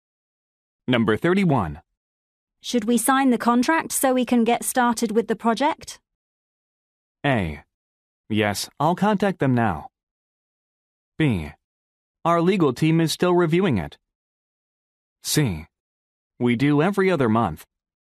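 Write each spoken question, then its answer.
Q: Should we sign the contract so we can get started with the project?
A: B: Our legal team is still reviewing it.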